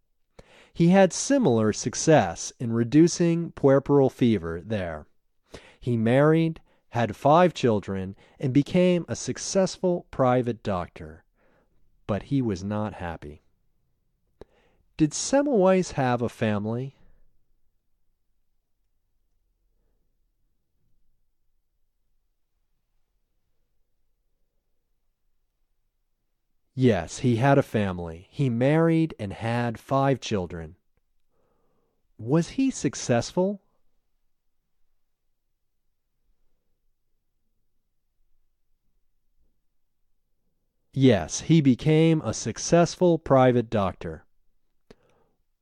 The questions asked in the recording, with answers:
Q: Did Semmelweis have a family?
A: Yes, he had a family. He married and had 5 children.